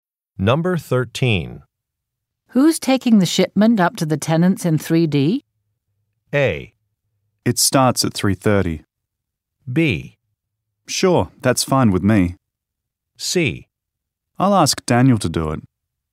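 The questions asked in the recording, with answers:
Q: Who's taking the shipment up to the tenants in 3D?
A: C: I'll ask Daniel to do it.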